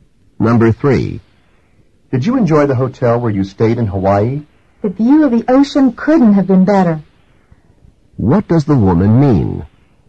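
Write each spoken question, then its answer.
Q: What does the woman mean?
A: The hotel's ocean view was excellent.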